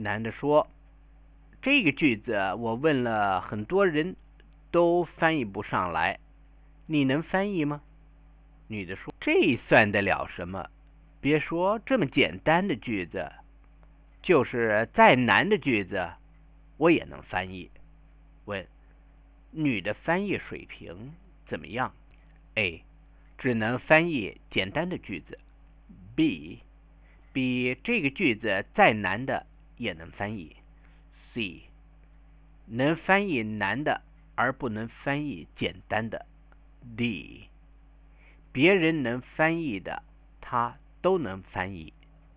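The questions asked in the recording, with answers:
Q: 女的翻译水平怎么样?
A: B: 比这个句子再难的也能翻译。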